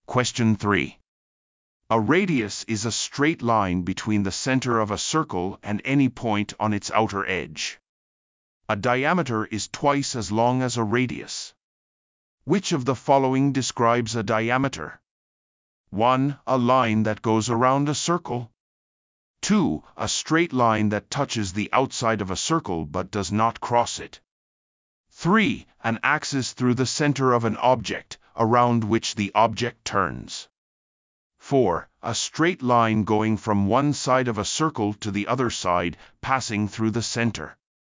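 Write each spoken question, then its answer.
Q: Which of the following describes a diameter?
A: 4: A straight line going from one side of a circle to the other side, passing through the center.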